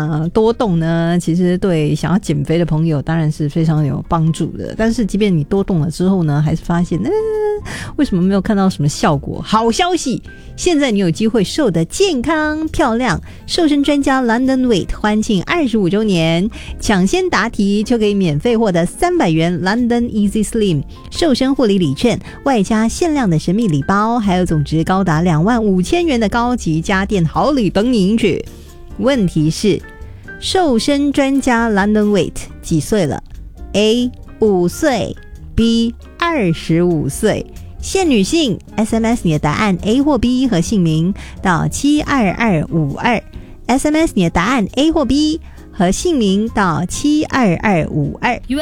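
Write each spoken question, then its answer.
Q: 问题是,瘦身专家 London Weight 几岁了?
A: B: 25岁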